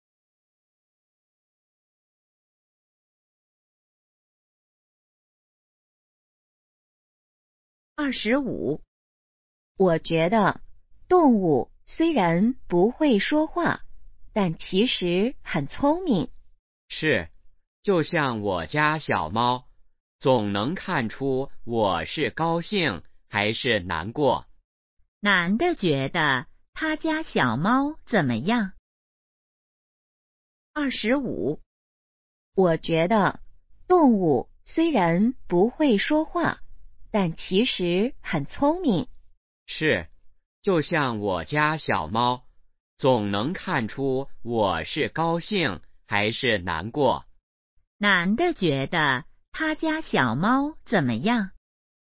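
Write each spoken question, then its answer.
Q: 男的觉得他家小猫怎么样?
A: 很聪明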